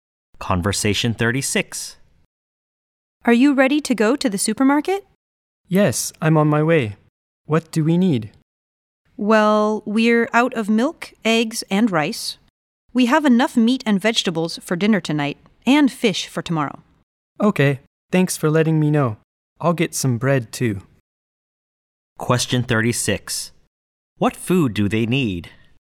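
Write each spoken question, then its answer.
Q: What food do they need?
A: Milk, eggs and rice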